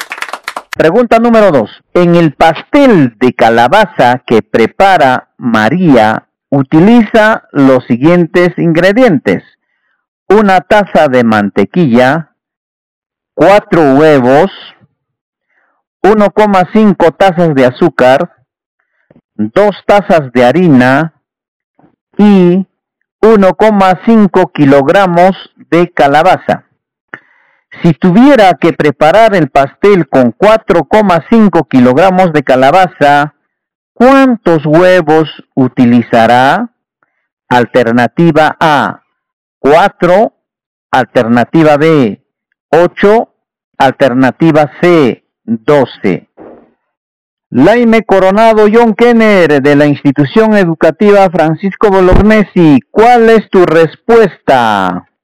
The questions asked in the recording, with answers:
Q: Si tuviera que preparar el pastel con 4,5 kilogramos de calabaza, ¿cuántos huevos utilizará?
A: La C, 12.